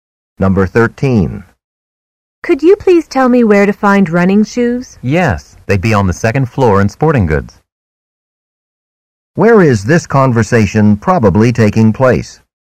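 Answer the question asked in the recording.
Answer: In a department store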